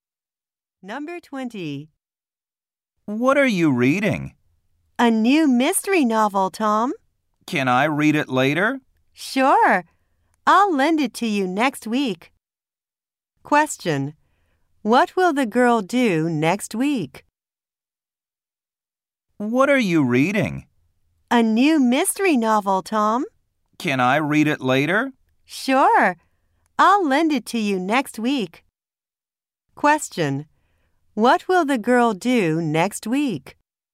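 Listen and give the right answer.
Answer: Lend Tom her novel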